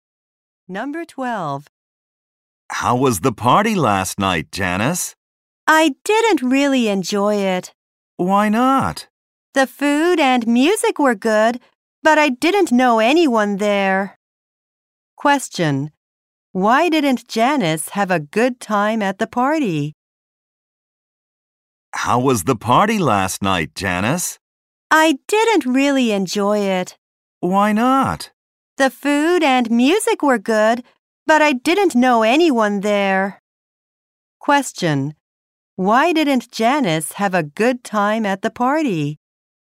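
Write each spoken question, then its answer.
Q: Question. Why didn't Janice have a good time at the party?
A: She didn't know anyone there.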